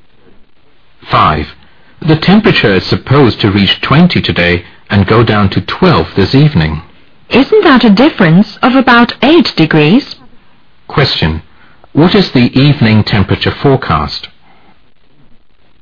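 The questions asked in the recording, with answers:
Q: What is the evening temperature forecast?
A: 12 degrees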